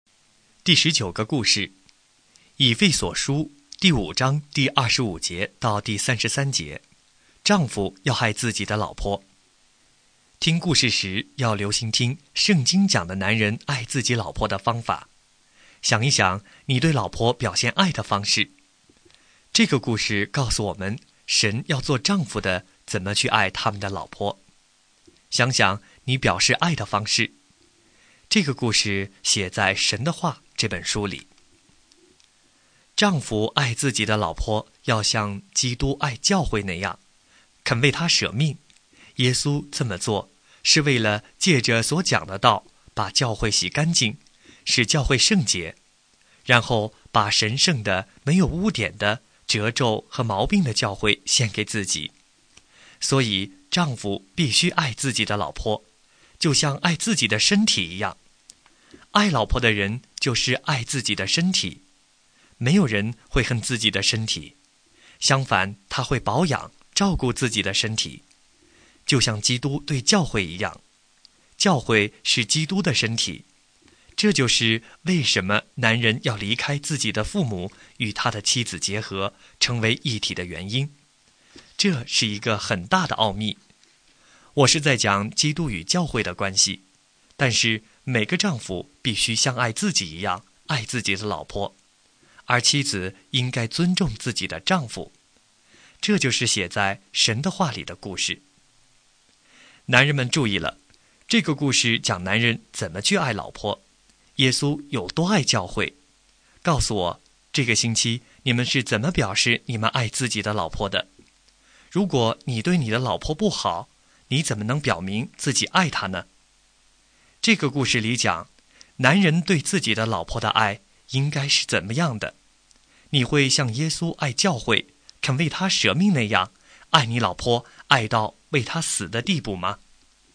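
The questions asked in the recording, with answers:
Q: 这个故事里讲,男人对自己的老婆的爱应该是怎么样的?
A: 要像基督爱教会那样,肯为她舍命,像爱自己的身体一样爱她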